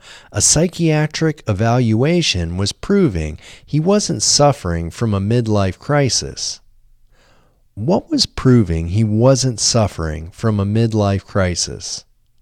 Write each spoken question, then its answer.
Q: What was proving he wasn't suffering from a midlife crisis?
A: A psychiatric evaluation was proving he wasn't suffering from a midlife crisis.